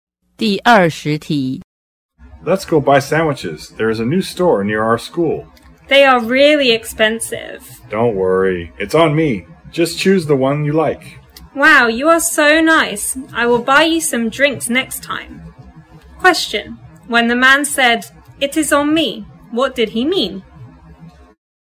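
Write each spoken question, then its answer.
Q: when the man said, "It is on me," what did he mean?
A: He will pay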